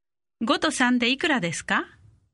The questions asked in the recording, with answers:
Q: 5と3でいくらですか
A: 8 8